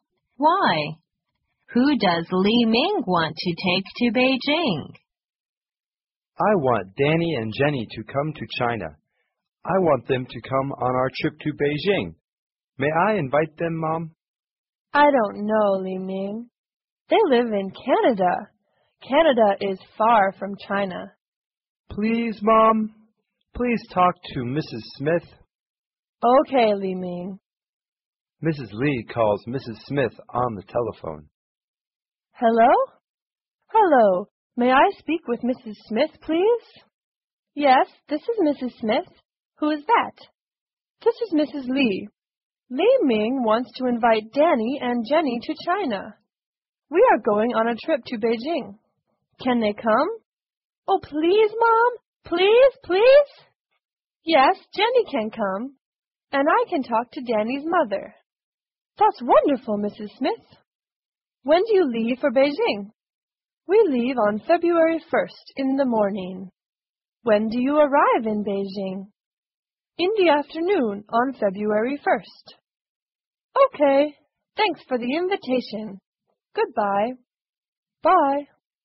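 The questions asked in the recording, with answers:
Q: Who does Li Ming want to take to Beijing?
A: Danny and Jenny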